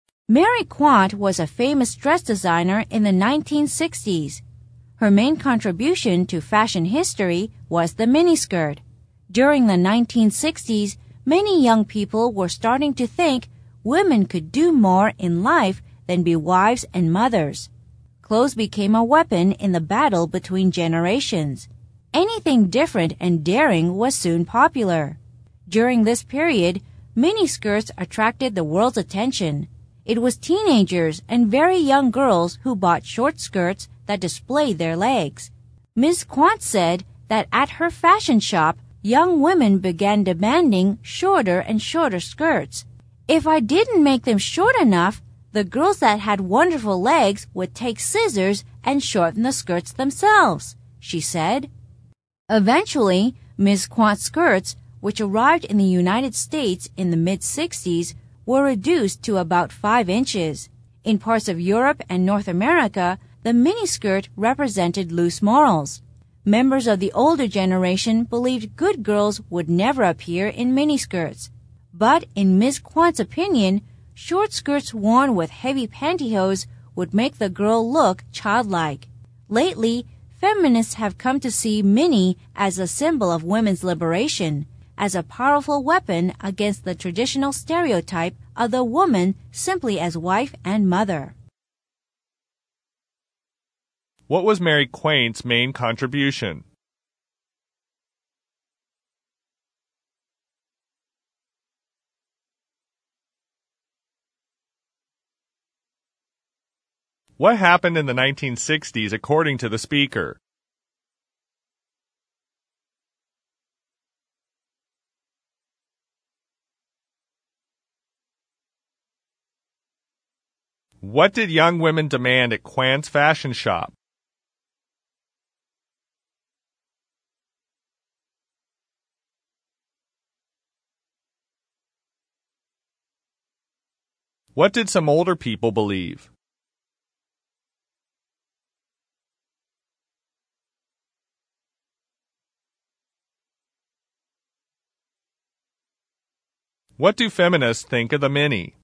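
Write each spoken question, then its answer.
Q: What was Mary Quant's main contribution?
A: The miniskirt

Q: What did young women demand at Quant's fashion shop?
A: Shorter and shorter skirts

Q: What did some older people believe?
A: Good girls would never appear in miniskirts

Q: What do feminists think of the mini?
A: A symbol of women's liberation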